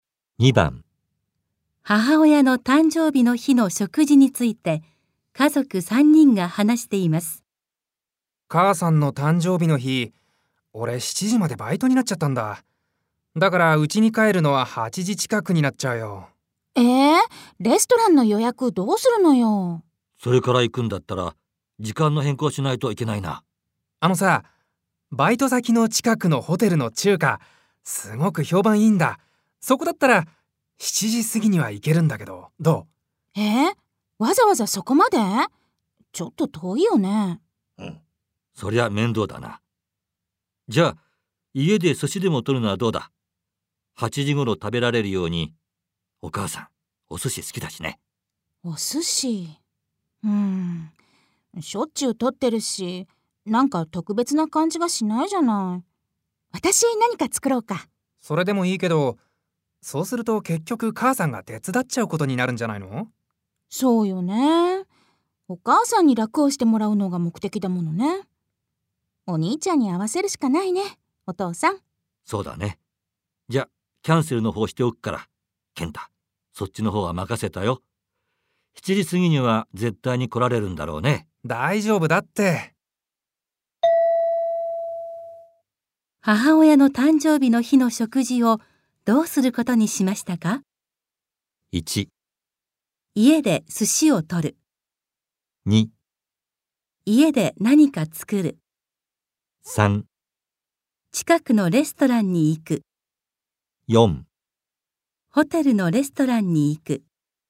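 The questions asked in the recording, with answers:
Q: 母親の誕生日の日の食事をどうすることにしましたか?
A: 4: ホテルのレストランに行く。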